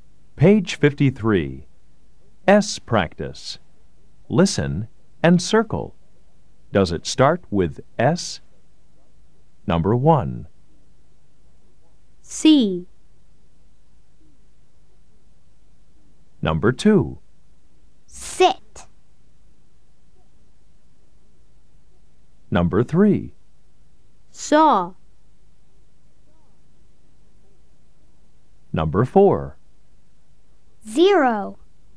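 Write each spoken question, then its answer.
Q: Number 2.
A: yes

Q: Number 3.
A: yes

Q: Number 4.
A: no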